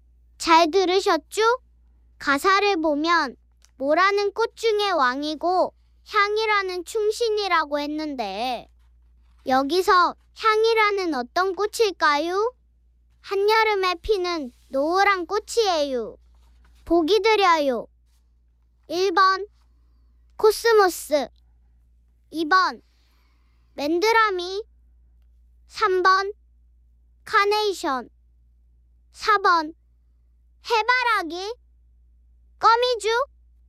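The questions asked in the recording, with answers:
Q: 여기서 향이라는 어떤 꽃일까요?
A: 4번: 해바라기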